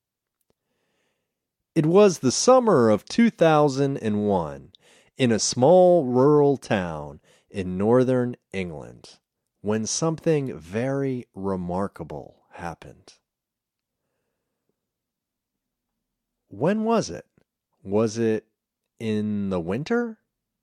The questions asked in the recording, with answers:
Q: When was it? Was it in the winter?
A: No, it wasn't the winter.